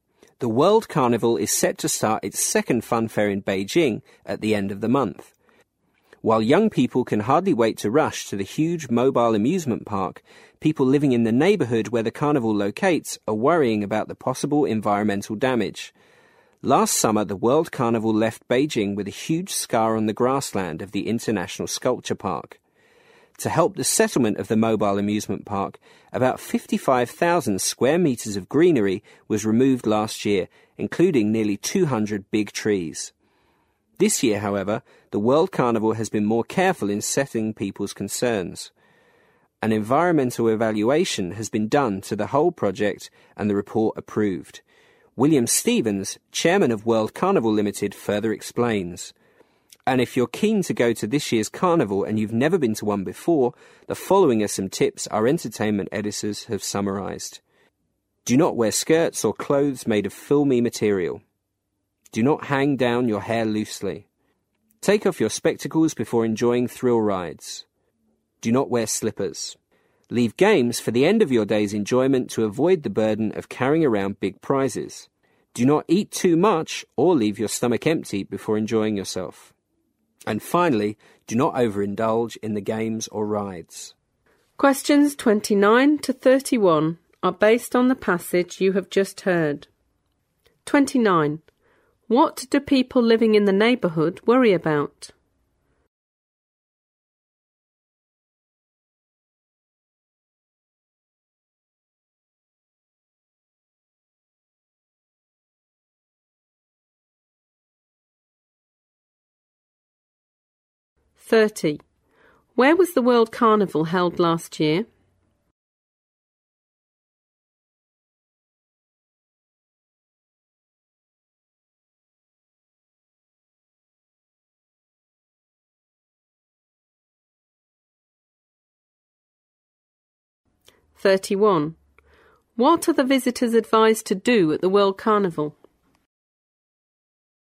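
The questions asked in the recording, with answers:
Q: What do people living in the neighbourhood worry about?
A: Possible environmental damage.

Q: Where was the World Carnival held last year?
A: In the International Sculpture Park in Beijing.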